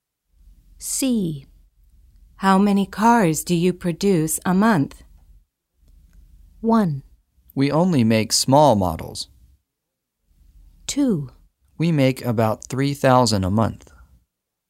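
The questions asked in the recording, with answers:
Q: How many cars do you produce a month?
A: 2: We make about 3,000 a month.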